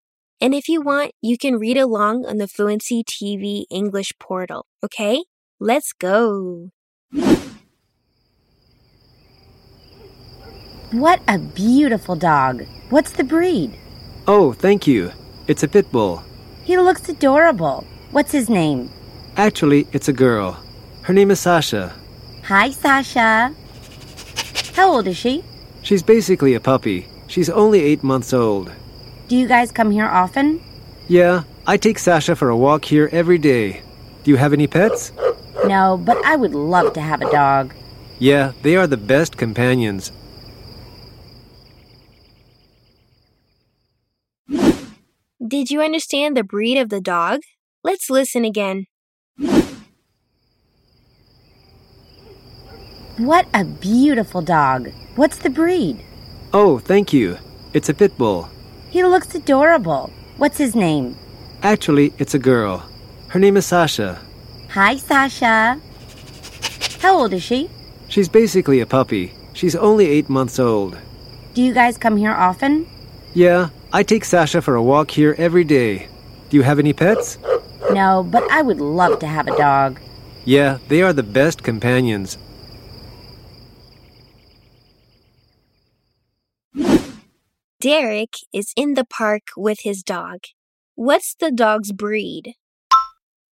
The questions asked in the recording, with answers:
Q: What's the dog's breed?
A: A pit bull.